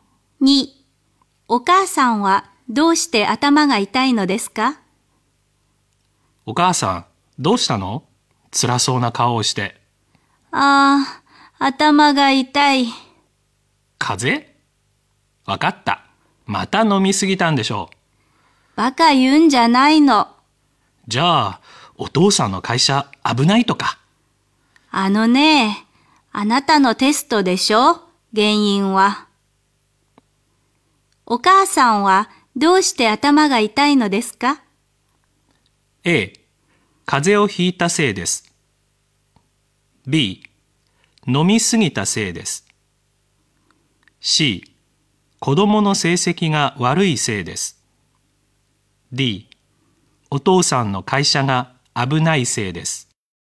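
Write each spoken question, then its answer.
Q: お母さんはどうして頭が痛いのですか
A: C: 子供の成績が悪いせいです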